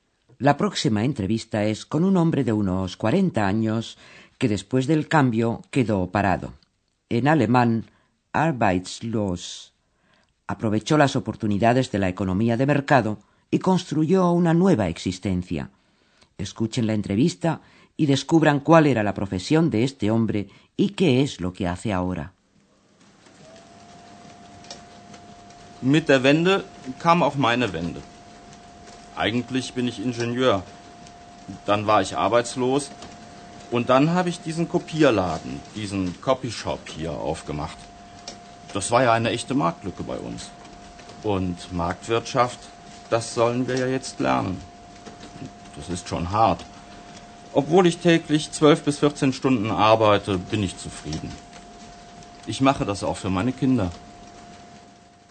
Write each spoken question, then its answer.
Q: descubran cuál era la profesión de este hombre y qué es lo que hace ahora.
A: El hombre era, antes del cambio, ingeniero.